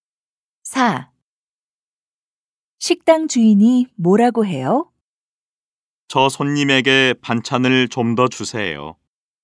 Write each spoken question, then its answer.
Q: 식당 주인이 뭐라고 해요?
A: 식당 주인이 저 손님에게 반찬을 좀 더 주라고 해요.